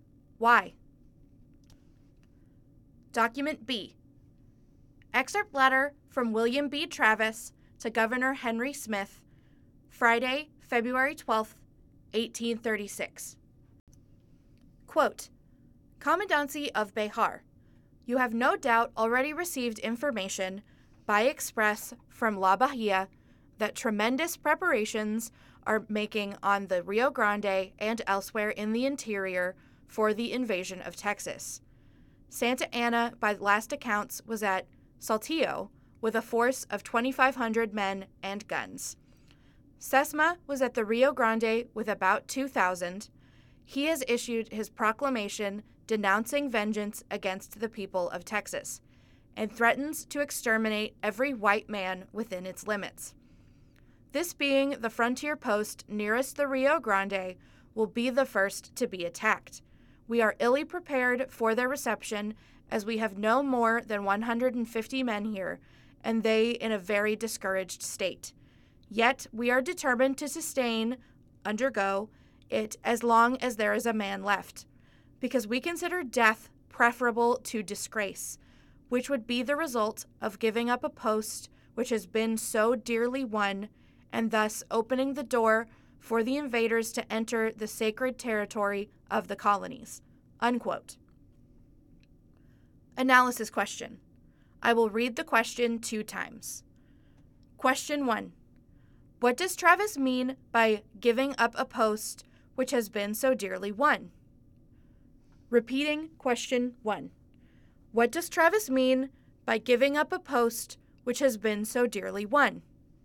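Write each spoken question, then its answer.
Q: What does Travis mean by giving up a post which has been so dearly won?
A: Béjar was won at a heavy cost, so giving it up would be a disgrace and would open the door for invaders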